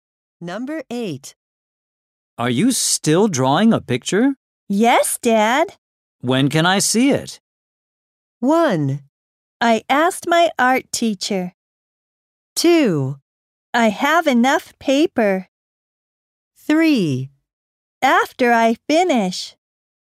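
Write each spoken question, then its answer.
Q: When can I see it?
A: 3: After I finish.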